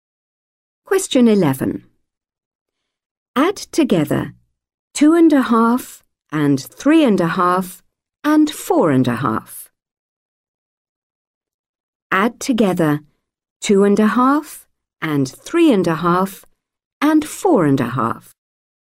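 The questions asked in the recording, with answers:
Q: Add together 2.5 and 3.5 and 4.5.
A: 10.5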